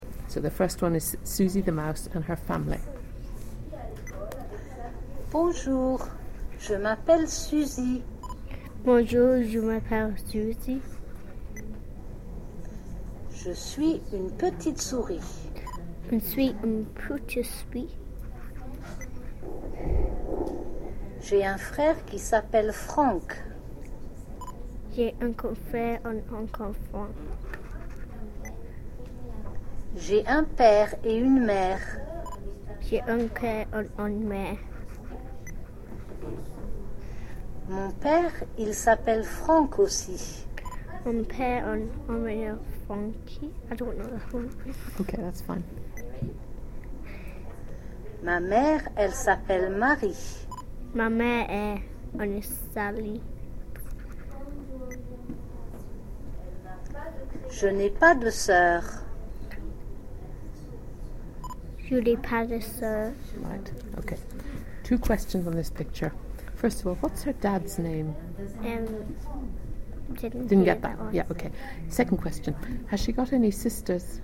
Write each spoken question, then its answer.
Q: Second question, has she got any sisters?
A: No.